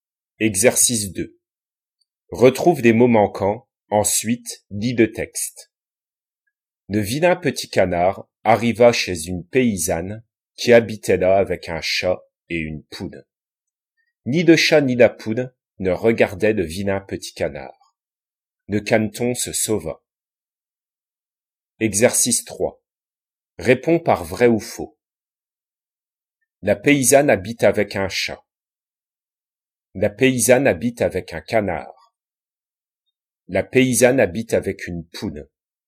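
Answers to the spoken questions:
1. vrai
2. faux
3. vrai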